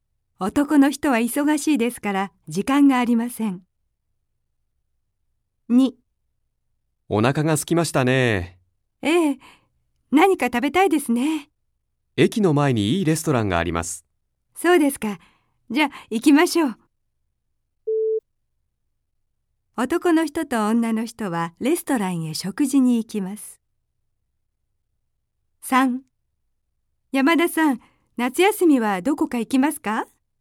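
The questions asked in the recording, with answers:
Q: 男の人と女の人はレストランへ食事に行きます。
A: ○(正しい)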